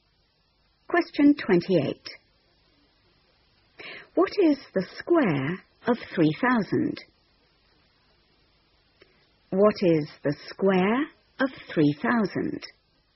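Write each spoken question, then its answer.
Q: What is the square of 3,000?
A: 9,000,000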